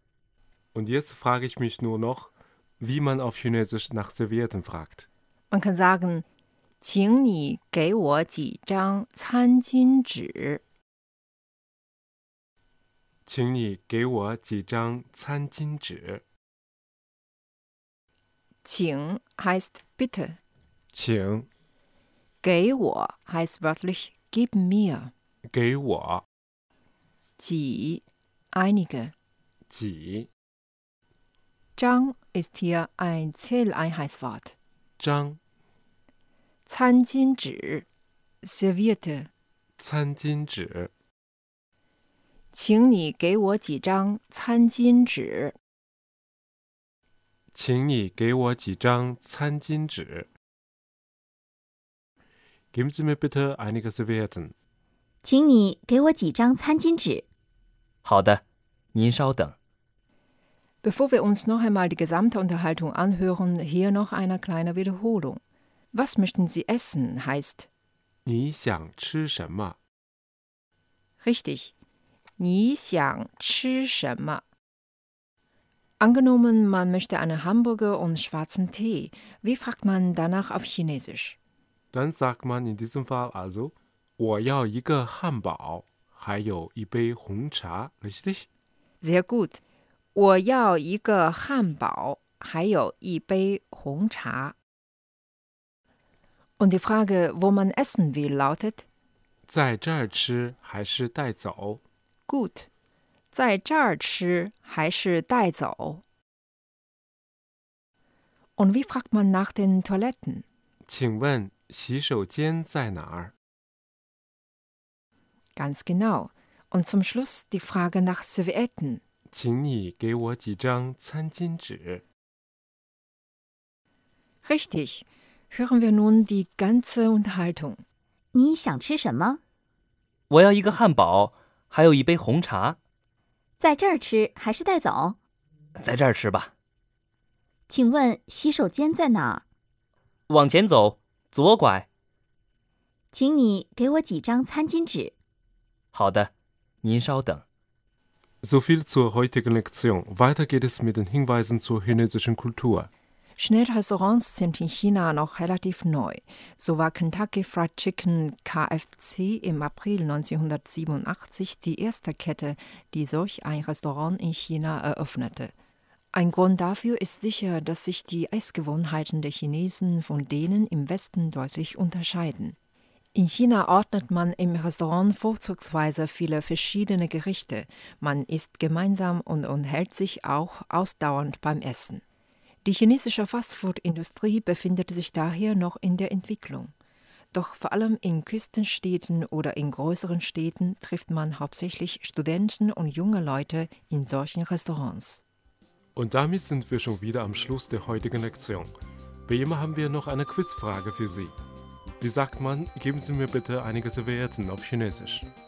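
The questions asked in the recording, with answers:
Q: Wie sagt man, geben Sie mir bitte einige Servietten auf Chinesisch?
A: 请你给我几张餐巾纸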